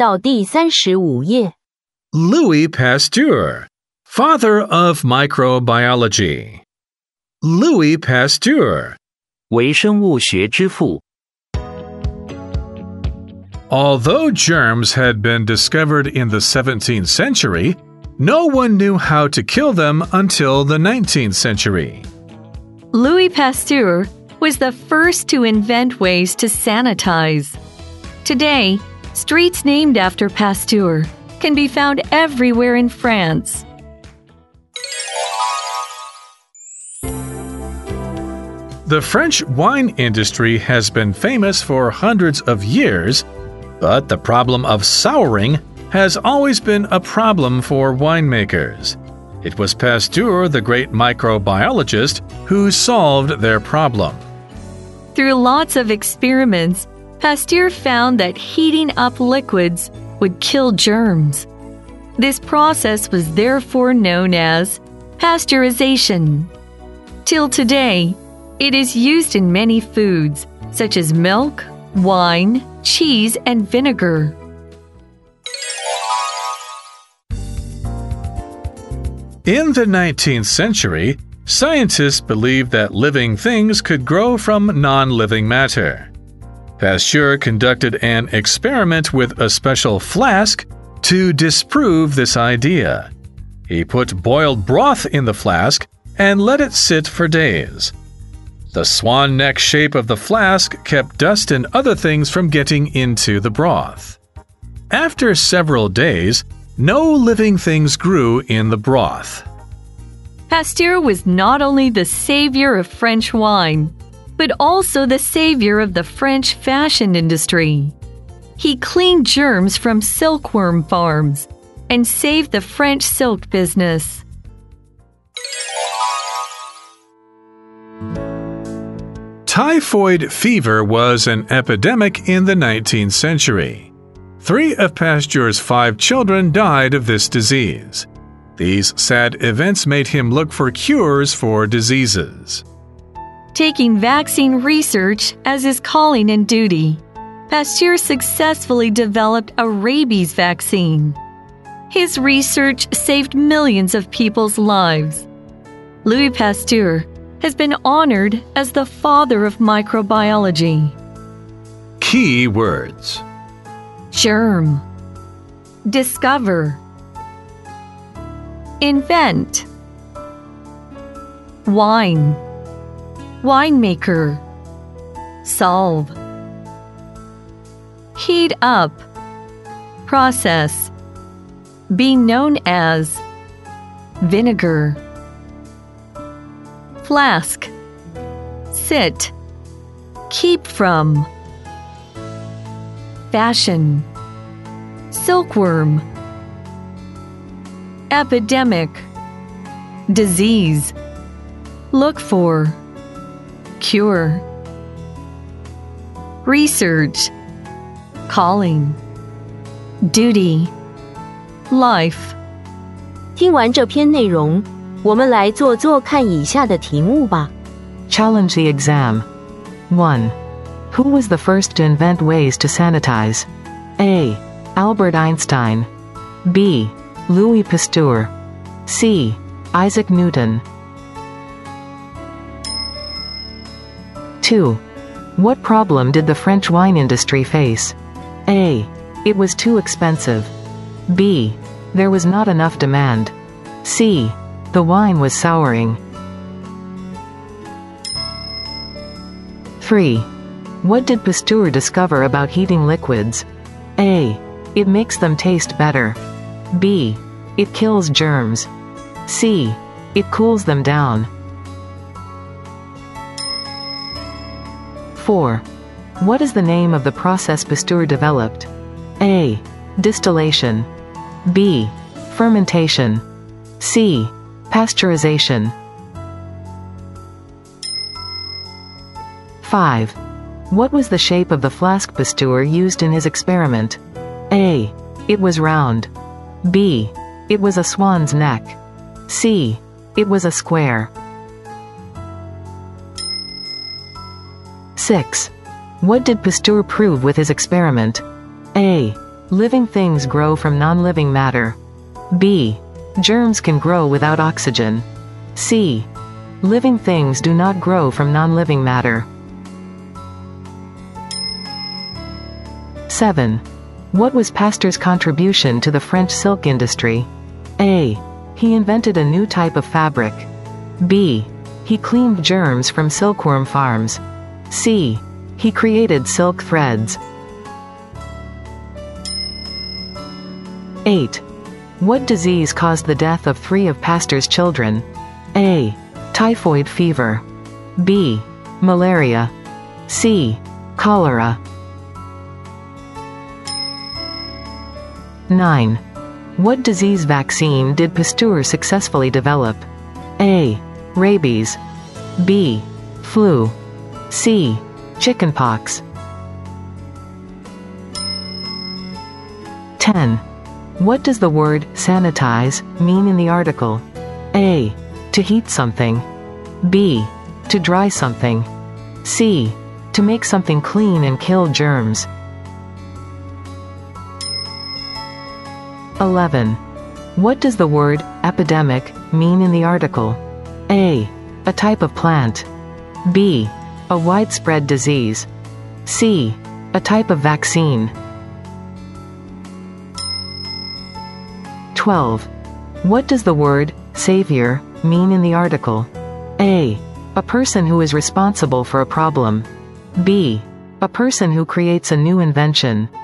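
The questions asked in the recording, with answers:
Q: Who was the first to invent ways to sanitize?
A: B: Louis Pasteur

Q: What problem did the French wine industry face?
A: C: The wine was souring

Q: What did Pasteur discover about heating liquids?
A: B: It kills germs

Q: What is the name of the process Pasteur developed?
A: C: Pasteurization

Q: What was the shape of the flask Pasteur used in his experiment?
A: B: It was a swan's neck

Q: What did Pasteur prove with his experiment?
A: C: Living things do not grow from non-living matter

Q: What was Pasteur's contribution to the French silk industry?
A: B: He cleaned germs from silkworm farms

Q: What disease caused the death of three of Pasteur's children?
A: A: Typhoid fever

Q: What disease vaccine did Pasteur successfully develop?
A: A: Rabies

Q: What does the word sanitize mean in the article?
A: C: To make something clean and kill germs

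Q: What does the word epidemic mean in the article?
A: B: A widespread disease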